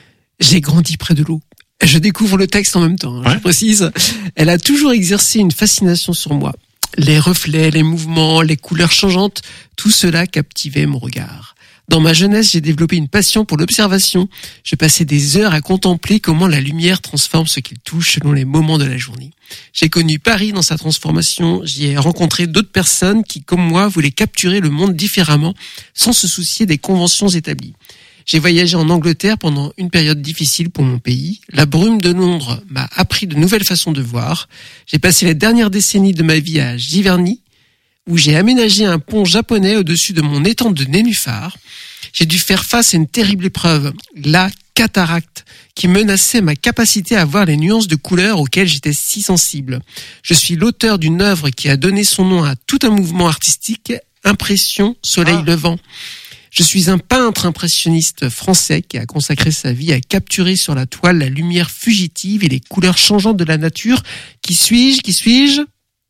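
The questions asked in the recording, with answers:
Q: Qui suis-je?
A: Claude Monet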